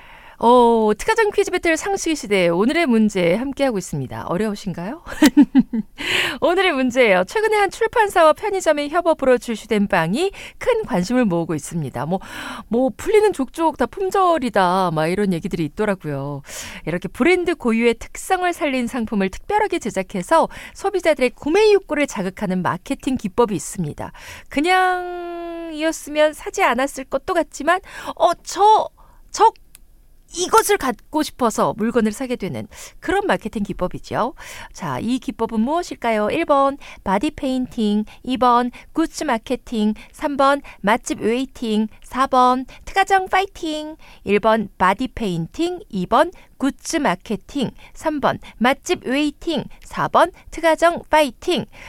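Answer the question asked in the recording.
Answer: 2: 굿즈 마케팅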